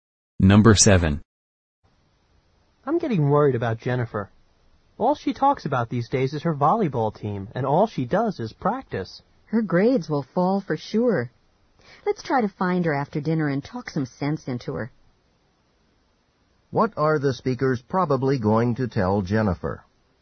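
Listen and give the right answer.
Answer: To spend less time on volleyball and more on her studies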